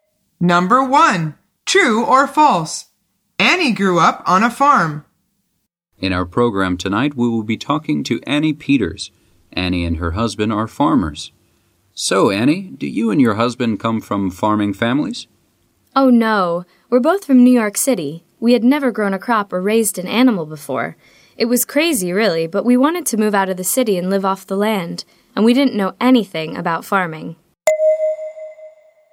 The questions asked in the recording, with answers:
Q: True or false? Annie grew up on a farm.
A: The answer is false.